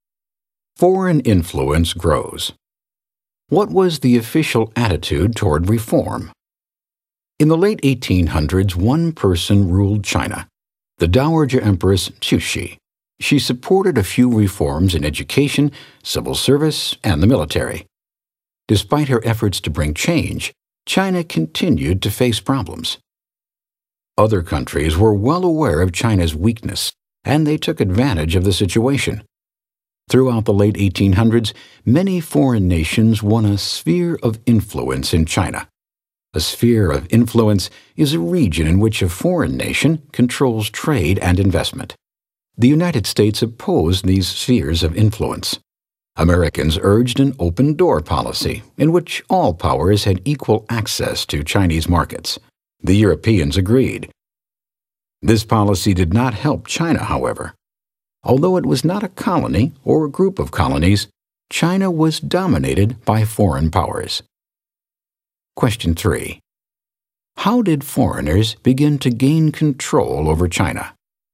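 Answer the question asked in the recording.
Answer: Many foreign nations won spheres of influence in China, where they controlled trade and investment.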